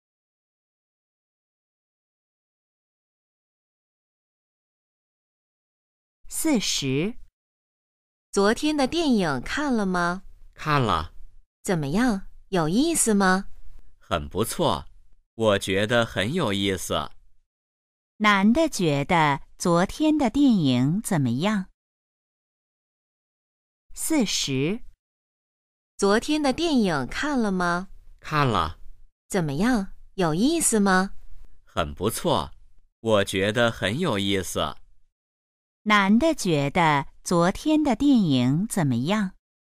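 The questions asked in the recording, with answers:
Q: 男的觉得昨天的电影怎么样?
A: 很有意思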